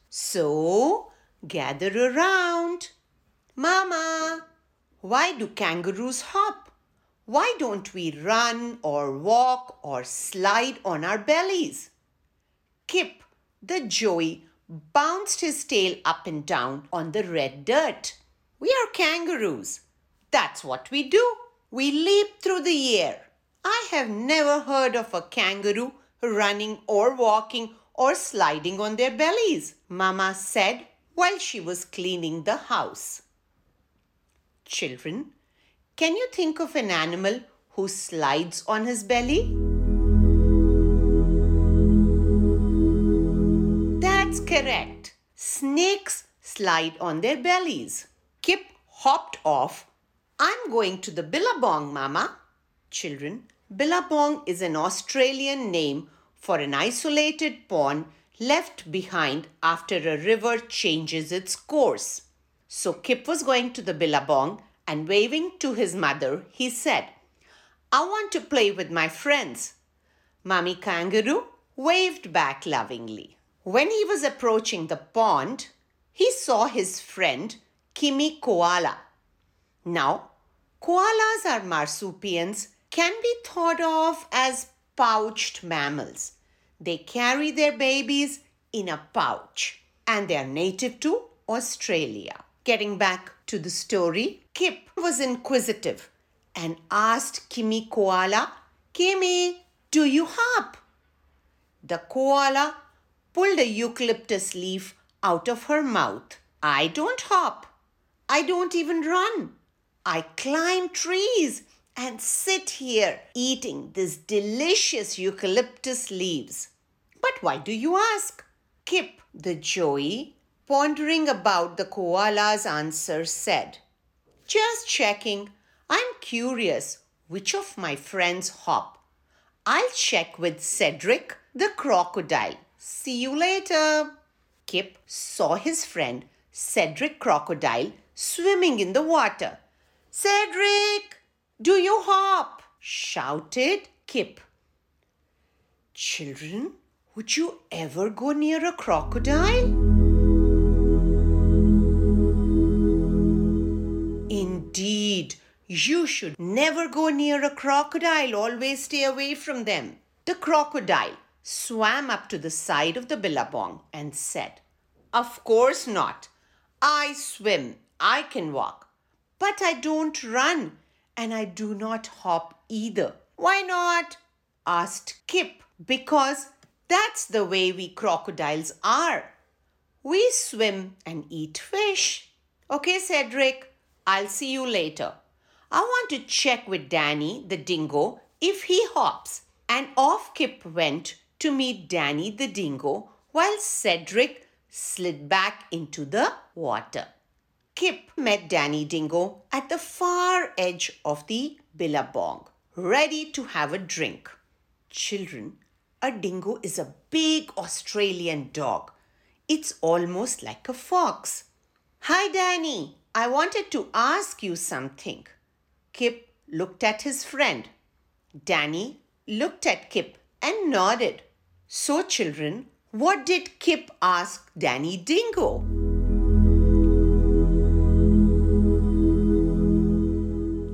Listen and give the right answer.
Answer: Yes, indeed. Kip asked Danny, do you hop?